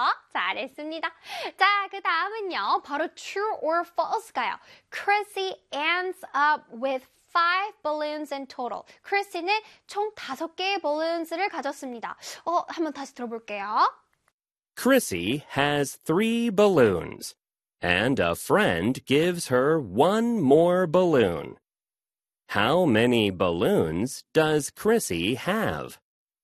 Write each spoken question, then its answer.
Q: Chrissy ends up with 5 balloons in total.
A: 3 plus 1 equals 4였죠. 그래서 정답은 false 되겠습니다.